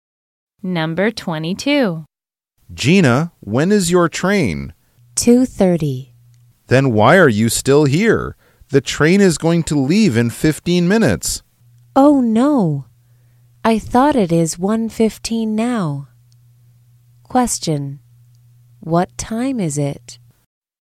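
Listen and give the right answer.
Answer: 2:15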